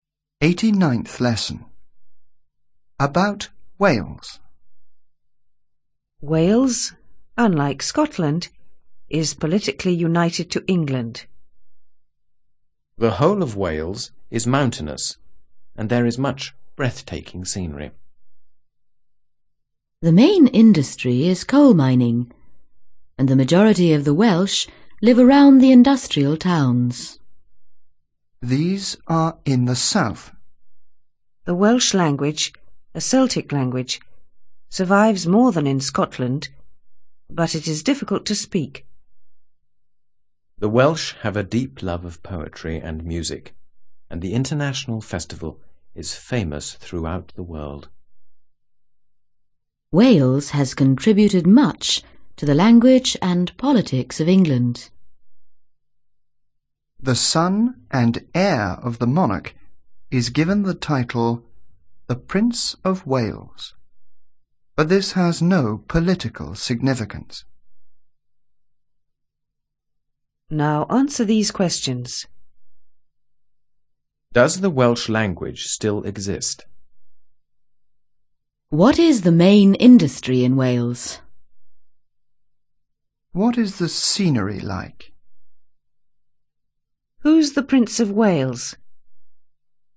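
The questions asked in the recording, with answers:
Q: Does the Welsh language still exist?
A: Yes, it survives more than in Scotland.

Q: What is the main industry in Wales?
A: Coal mining

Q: What is the scenery like?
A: Mountainous and breathtaking

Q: Who's the Prince of Wales?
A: The son and heir of the monarch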